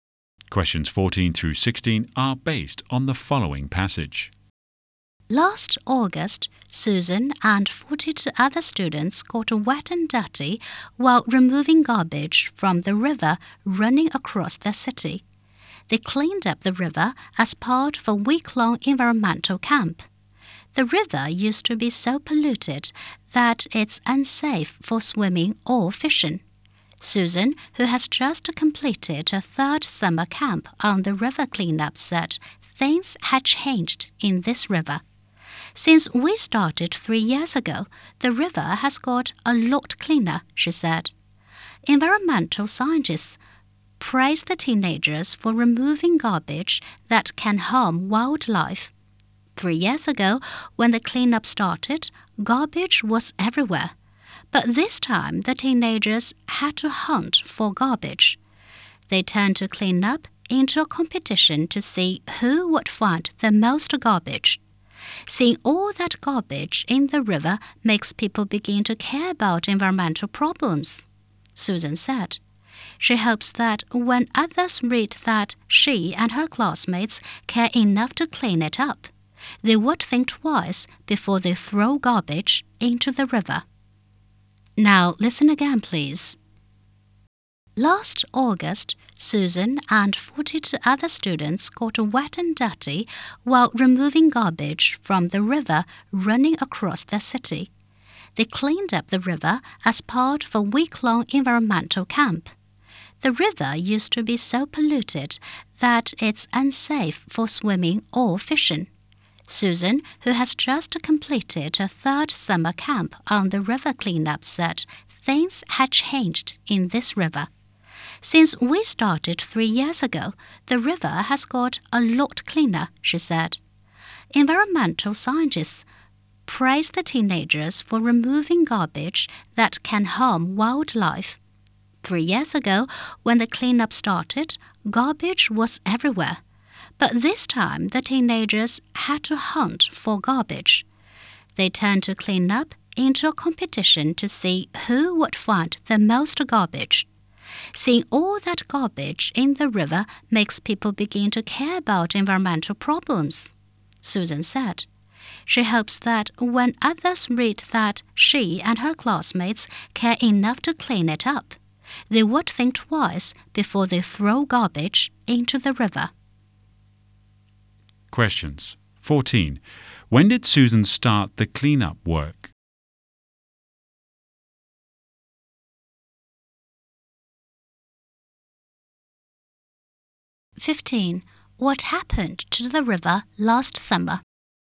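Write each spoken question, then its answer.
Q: When did Susan start the cleanup work?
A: Three years ago

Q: What happened to the river last summer?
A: It was much cleaner; the teenagers had to hunt for garbage.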